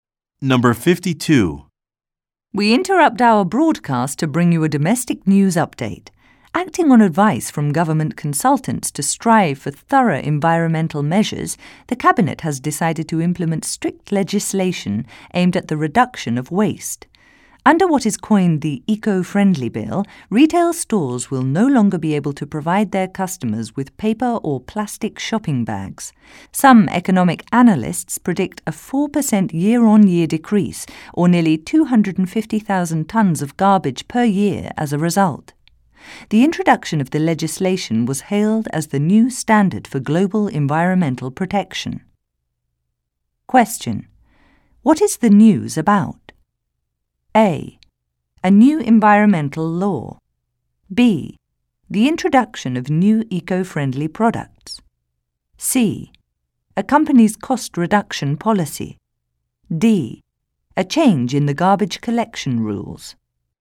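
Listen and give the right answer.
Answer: A: A new environmental law.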